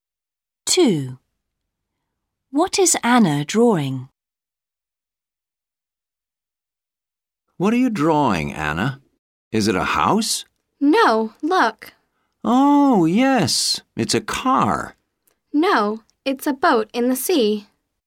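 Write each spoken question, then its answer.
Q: What is Anna drawing?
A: a boat in the sea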